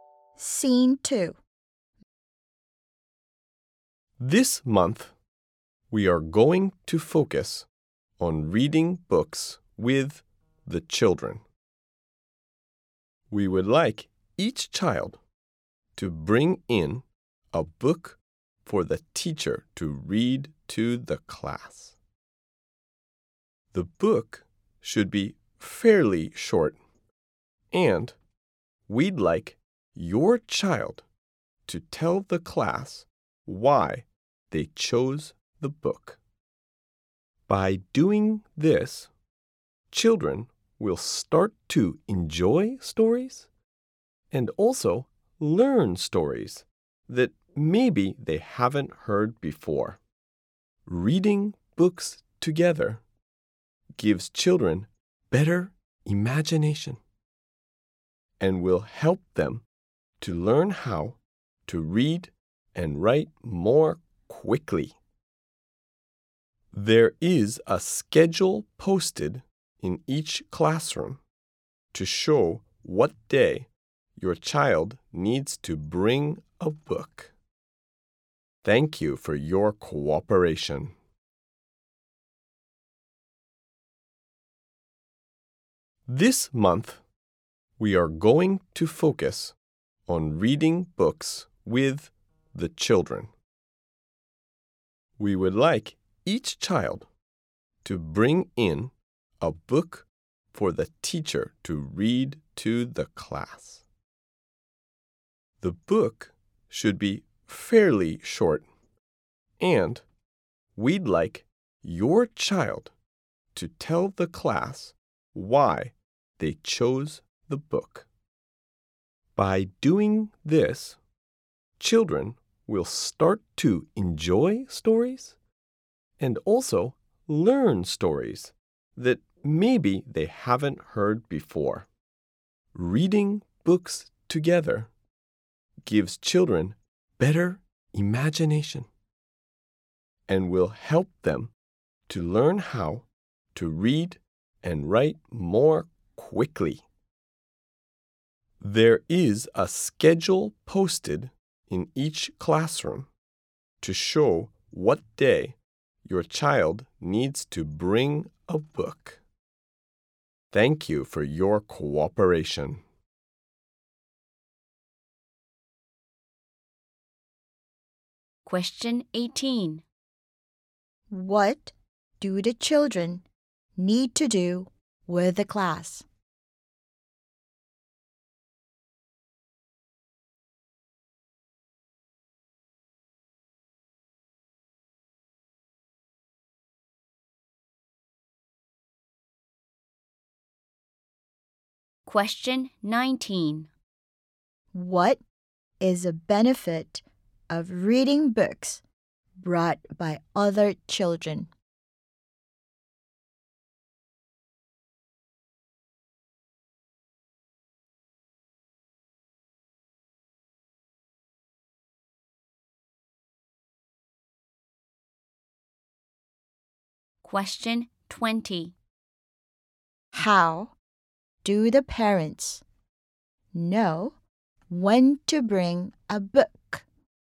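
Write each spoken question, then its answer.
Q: What do the children need to do with the class?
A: Tell the class why they chose their book

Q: What is a benefit of reading books brought by other children?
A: They learn stories they haven't heard before

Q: How do the parents know when to bring a book?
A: From a schedule posted in each classroom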